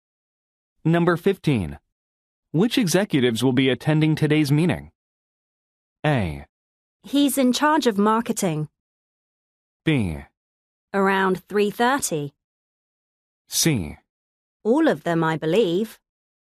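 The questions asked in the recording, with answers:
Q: Which executives will be attending today's meeting?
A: C: All of them, I believe.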